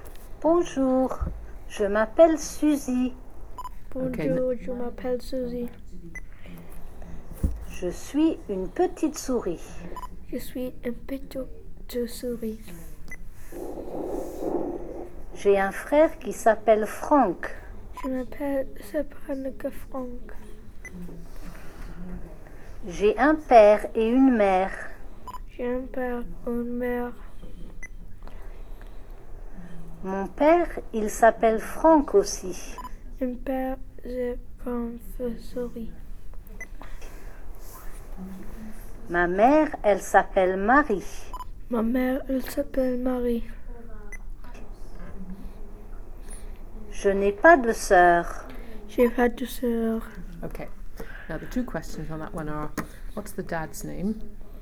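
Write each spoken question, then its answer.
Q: what's the dad's name?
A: Franck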